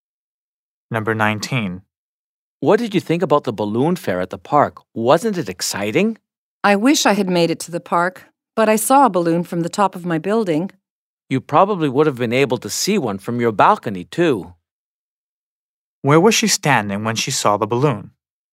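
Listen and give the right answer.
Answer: On top of her building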